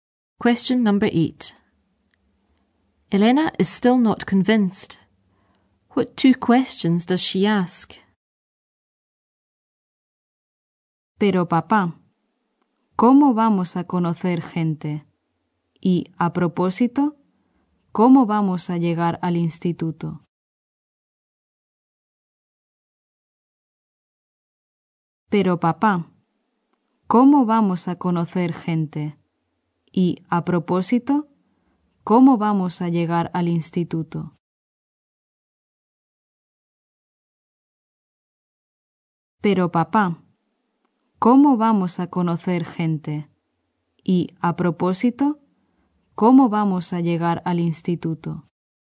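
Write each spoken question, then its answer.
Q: What two questions does she ask?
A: How will we meet people? How will we get to school?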